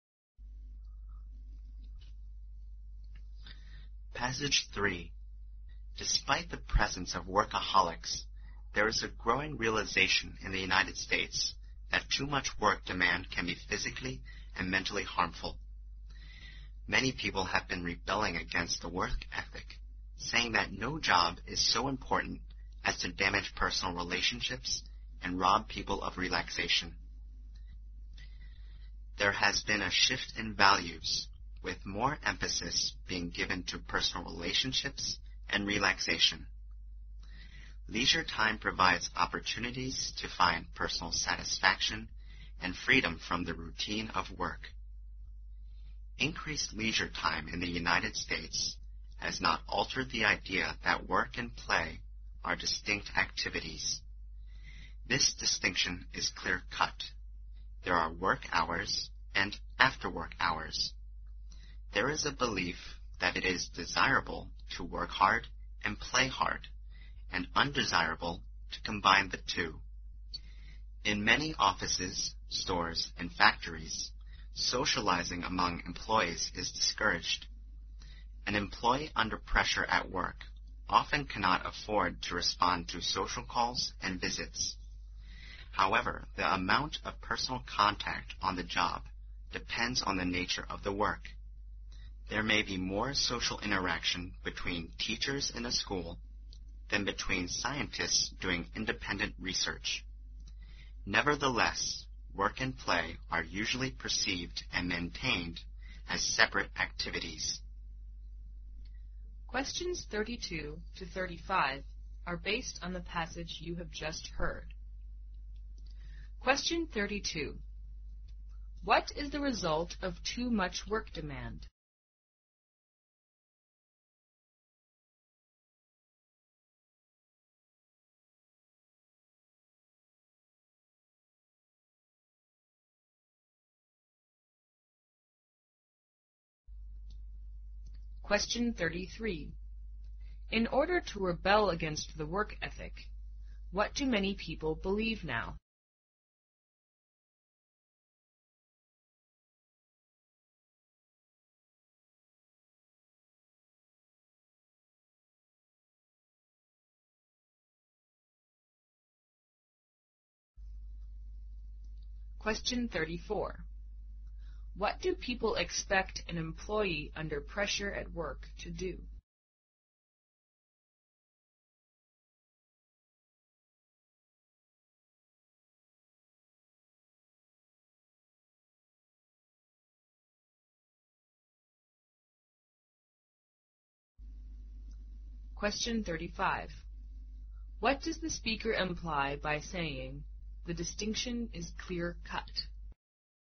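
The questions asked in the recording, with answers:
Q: What is the result of too much work demand?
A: It can be physically and mentally harmful

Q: In order to rebel against the work ethic, what do many people believe now?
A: No job is so important as to damage personal relationships and rob people of relaxation

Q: What do people expect an employee under pressure at work to do?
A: Not to respond to social calls and visits

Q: What does the speaker imply by saying, "The distinction is clear-cut"?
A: Work and play are kept strictly separate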